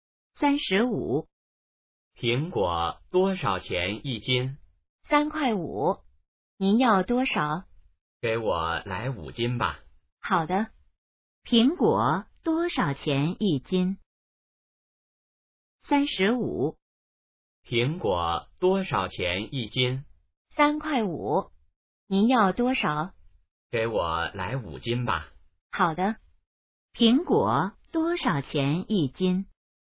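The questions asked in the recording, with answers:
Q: 苹果多少钱一斤?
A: 3.5元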